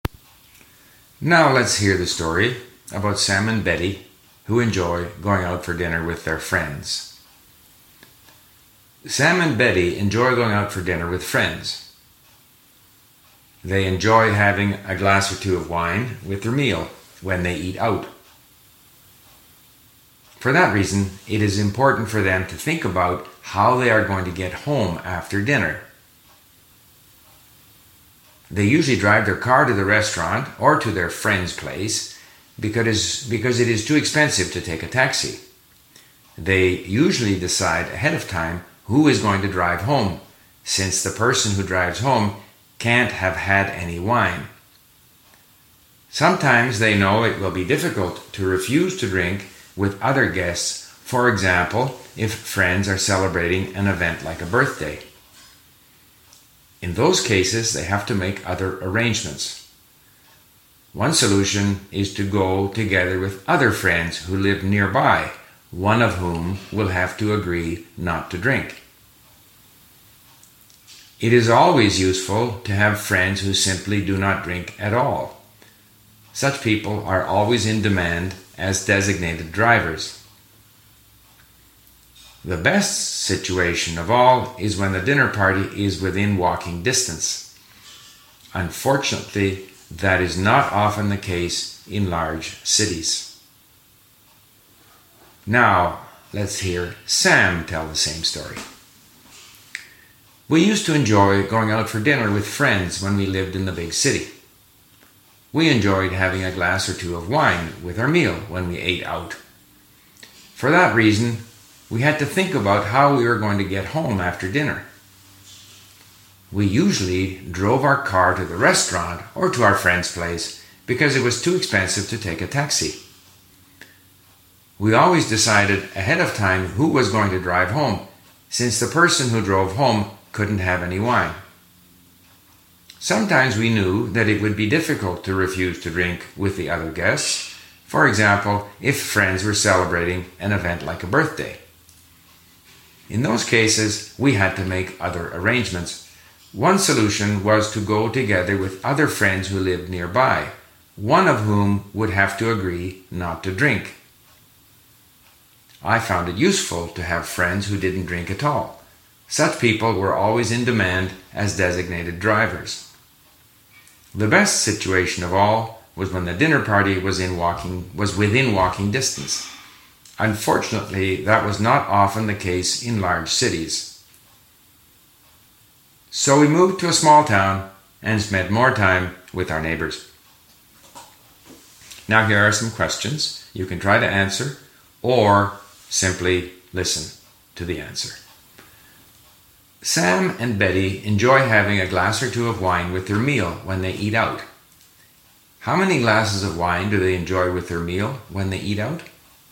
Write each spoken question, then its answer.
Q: How many glasses of wine do they enjoy with their meal when they eat out?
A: They enjoy having a glass or two of wine with their meal when they eat out.